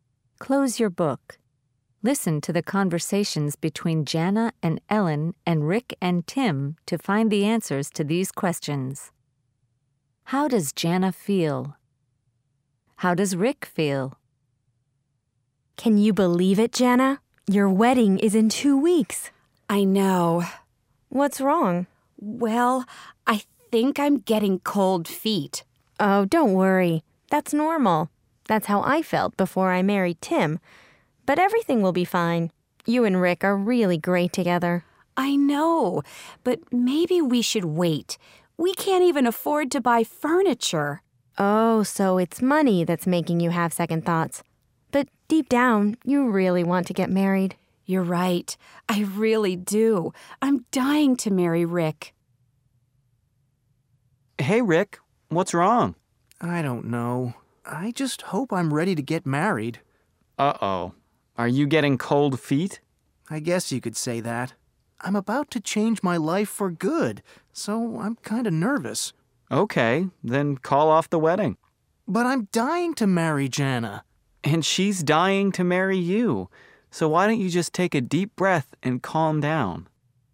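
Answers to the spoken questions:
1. She's getting cold feet (nervous about the wedding, worried about money)
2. He's getting cold feet; he's nervous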